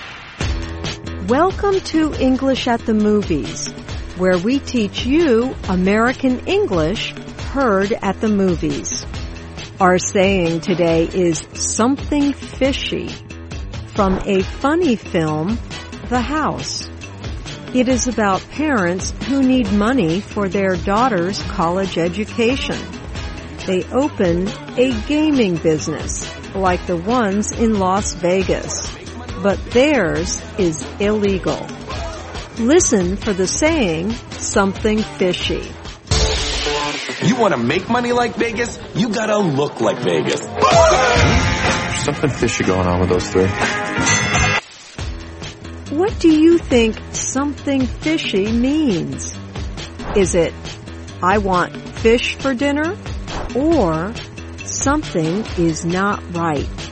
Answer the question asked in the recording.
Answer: Something fishy means something is not right.